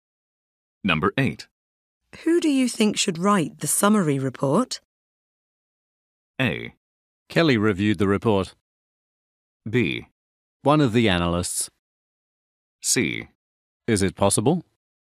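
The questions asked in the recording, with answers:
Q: Who do you think should write the summary report?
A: B: One of the analysts.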